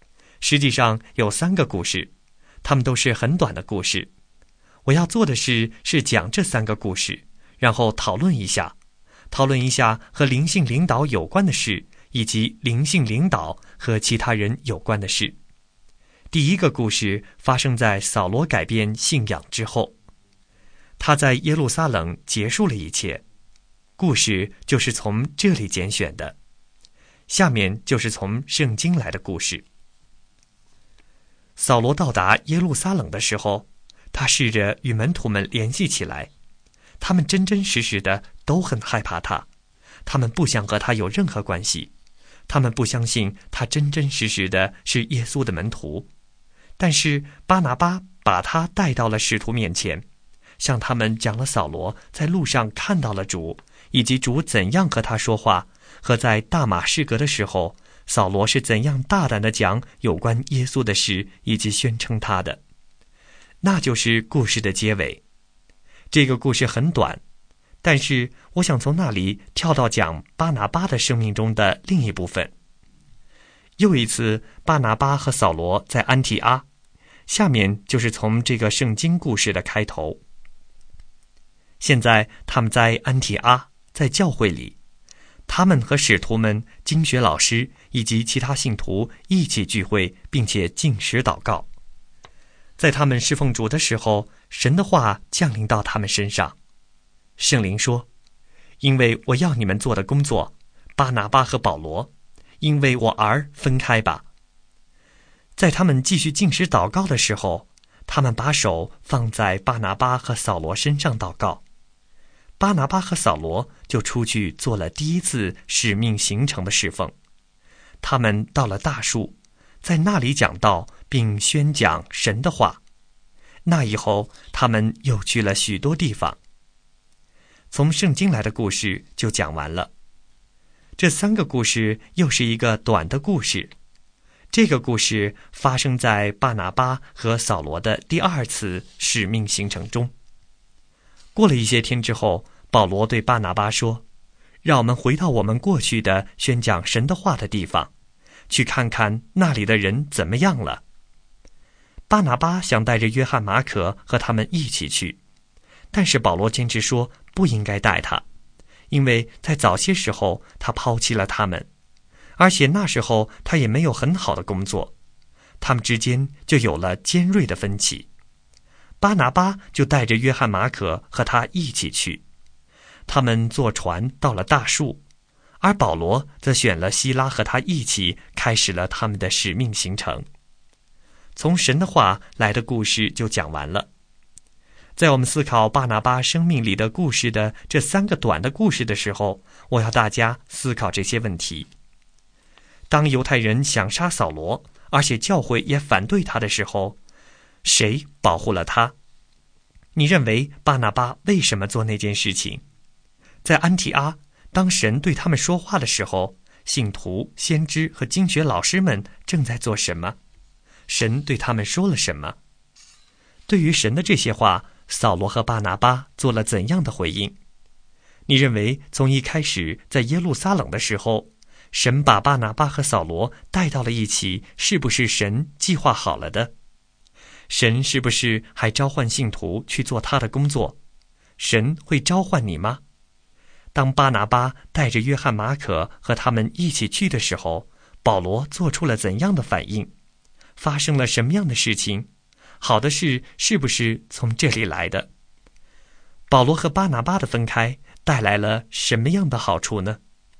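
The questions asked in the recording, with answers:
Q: 当犹太人想杀扫罗,而且教会也反对他的时候,谁保护了他?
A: 巴拿巴

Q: 在安提阿,当神对他们说话的时候,信徒、先知和经学老师们正在做什么?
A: 禁食祷告、侍奉主

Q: 神对他们说了什么?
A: 要为他的工作把巴拿巴和扫罗分开

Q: 对于神的这些话,扫罗和巴拿巴做了怎样的回应?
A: 他们出去开始了第一次使命行程

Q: 当巴拿巴带着约翰马可和他们一起去的时候,保罗做出了怎样的反应?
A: 保罗坚持不带他,两人起了尖锐分歧,保罗选了希拉一起去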